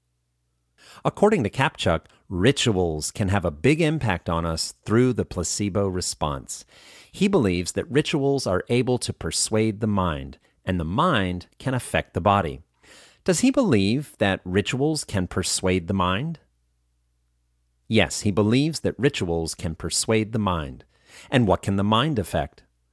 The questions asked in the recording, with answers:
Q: And what can the mind affect?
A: The mind can affect the body.